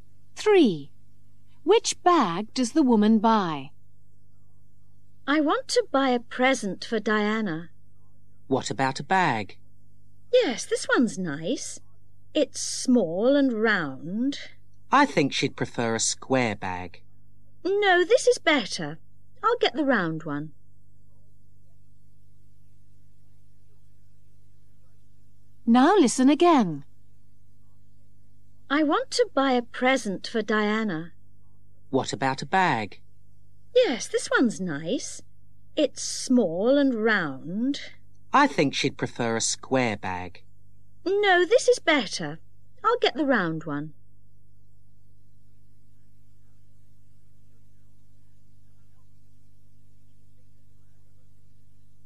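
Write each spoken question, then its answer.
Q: Which bag does the woman buy?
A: The small round one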